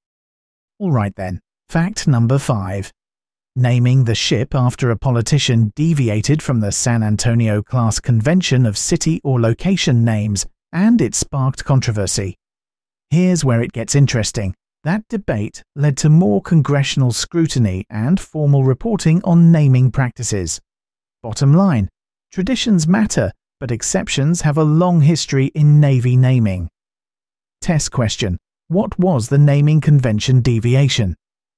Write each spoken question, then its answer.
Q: What was the naming convention deviation?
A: Correct answer. It was named after a politician.